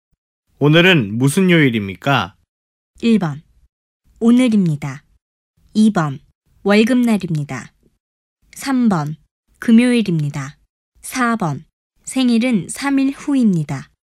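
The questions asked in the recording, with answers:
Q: 오늘은 무슨 요일입니까?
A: 3: 금요일입니다.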